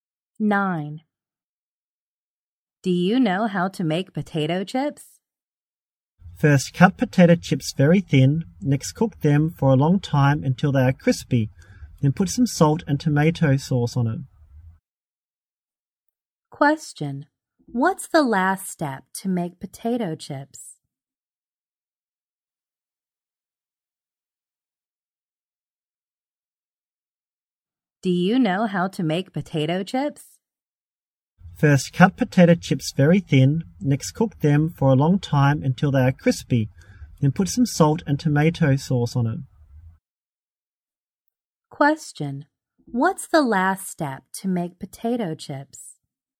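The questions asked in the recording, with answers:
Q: What's the last step to make potato chips?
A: Put some salt and tomato sauce on them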